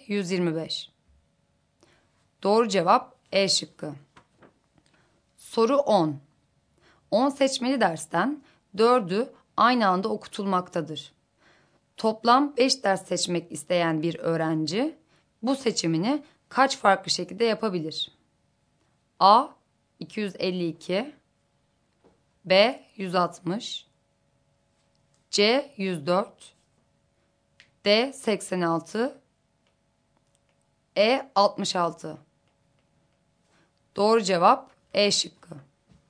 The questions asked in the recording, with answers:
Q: Toplam 5 ders seçmek isteyen bir öğrenci bu seçimini kaç farklı şekilde yapabilir?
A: Doğru cevap E şıkkı.